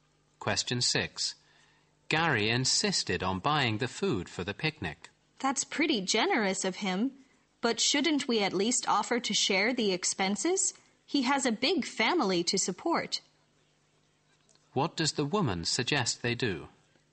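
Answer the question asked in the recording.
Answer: Offer to share the cost of the food with Gary.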